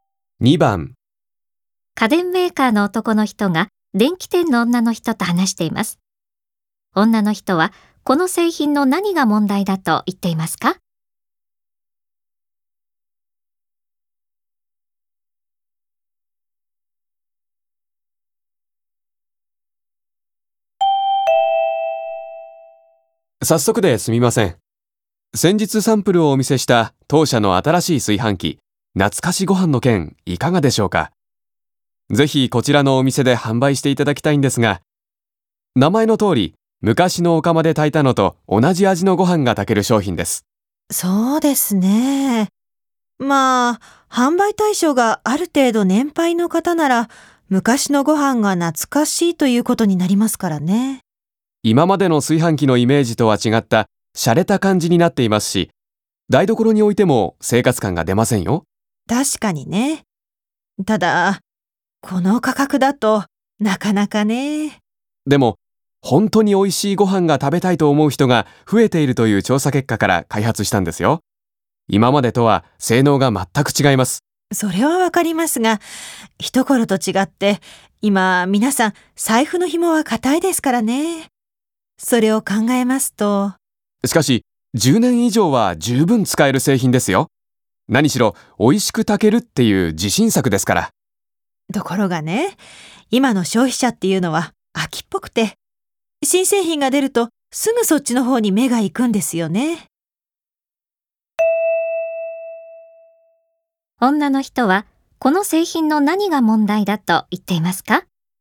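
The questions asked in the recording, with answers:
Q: 女の人はこの製品の何が問題だと言っていますか?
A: 値段が高いこと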